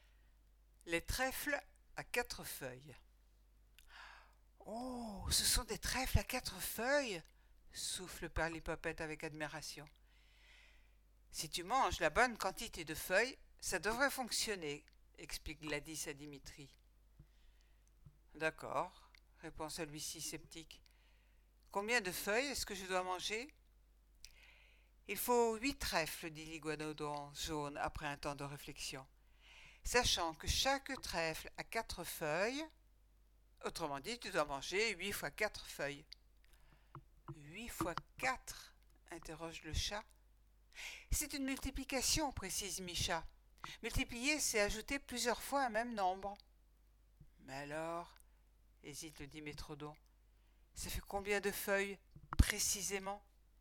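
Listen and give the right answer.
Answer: 32 feuilles (8 × 4)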